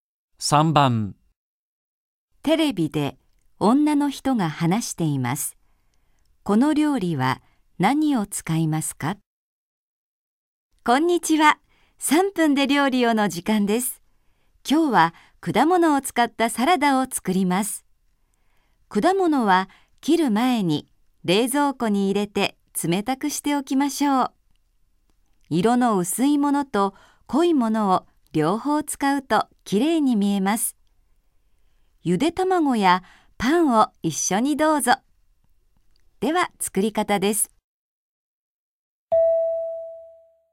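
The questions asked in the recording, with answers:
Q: この料理は何を使いますか?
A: 果物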